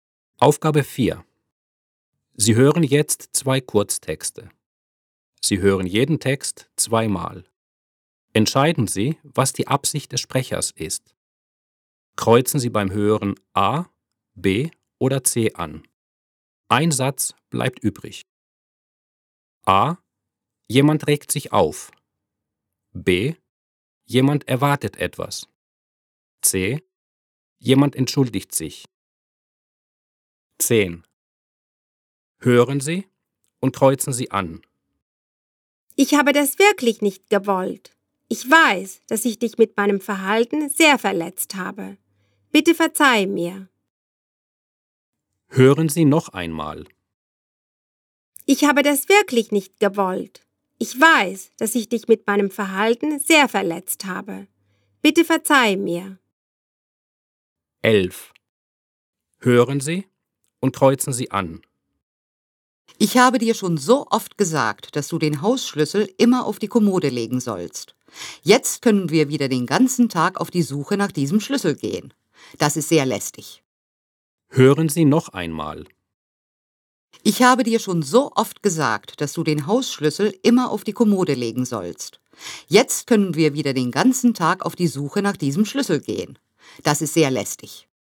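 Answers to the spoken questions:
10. C: Jemand entschuldigt sich.
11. A: Jemand regt sich auf.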